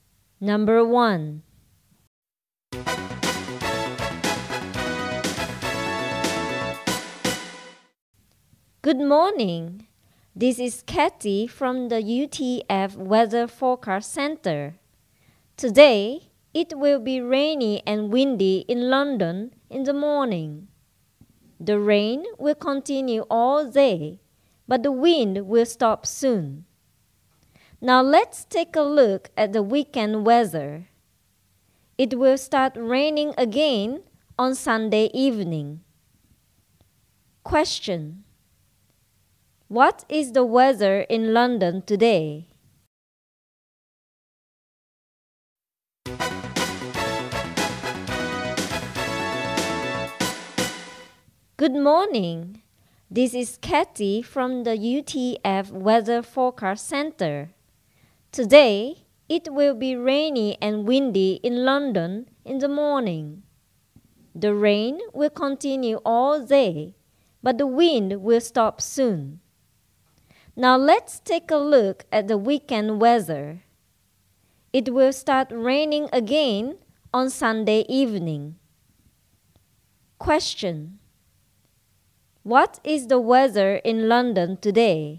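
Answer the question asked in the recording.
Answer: Rainy all day, and windy in the morning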